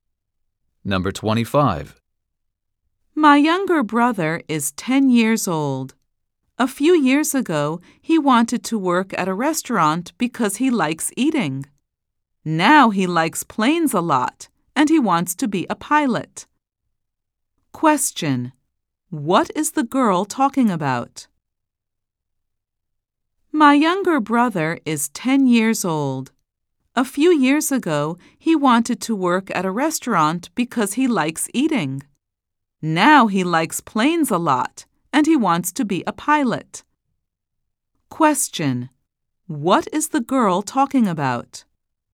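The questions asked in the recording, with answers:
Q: What is the girl talking about?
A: Her brother's dream job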